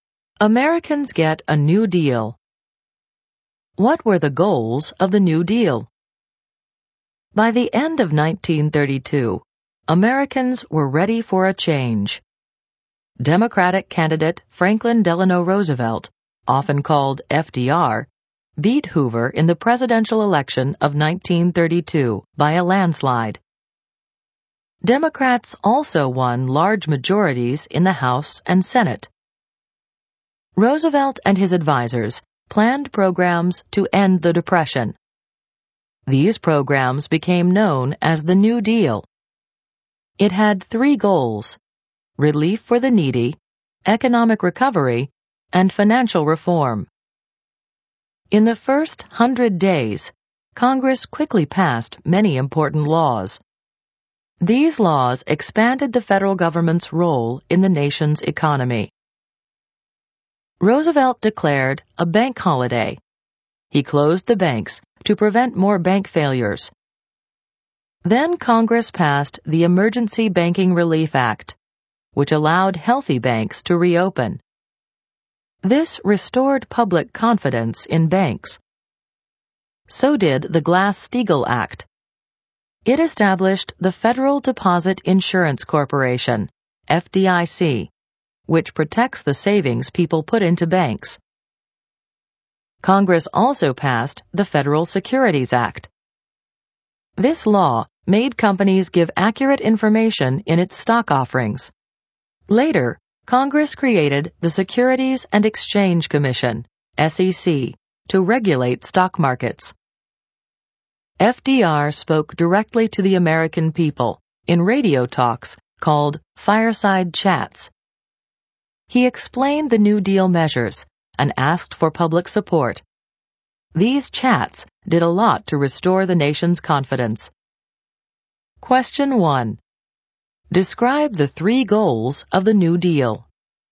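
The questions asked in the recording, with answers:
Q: Describe the three goals of the New Deal.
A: Relief for the needy, economic recovery, and financial reform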